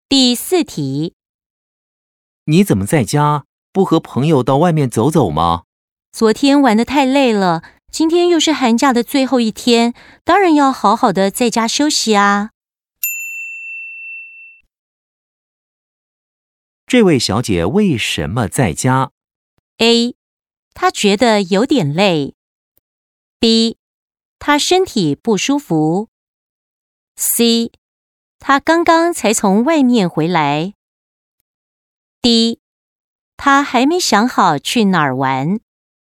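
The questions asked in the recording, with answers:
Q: 这位小姐为什么在家?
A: A: 她觉得有点累。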